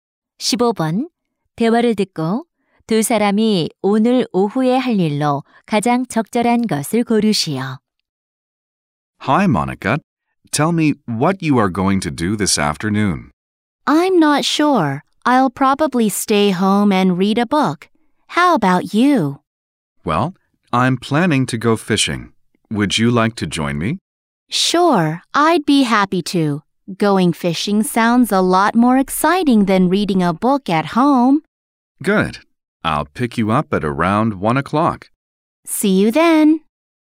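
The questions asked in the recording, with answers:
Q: 대화를 듣고 두 사람이 오늘 오후에 할 일로 가장 적절한 것을 고르시오.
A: 낚시하러 가기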